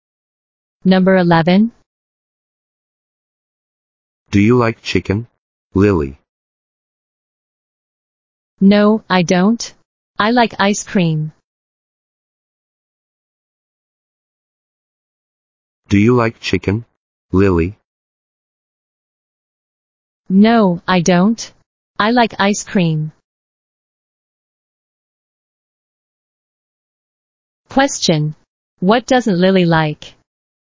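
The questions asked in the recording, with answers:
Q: What doesn't Lily like?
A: Chicken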